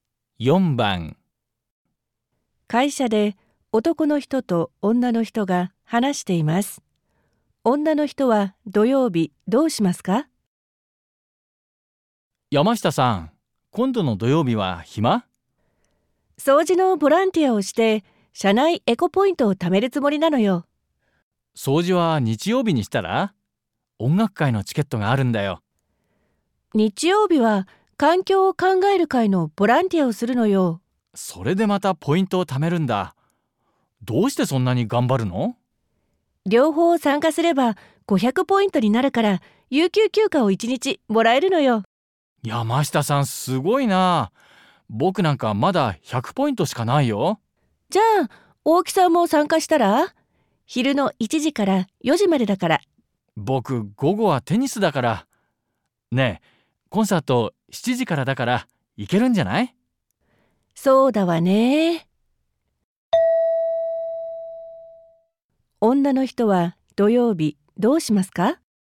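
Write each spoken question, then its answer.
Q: 女の人は土曜日どうしますか?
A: 掃除のボランティアをしてから、夜7時の音楽会(コンサート)に行く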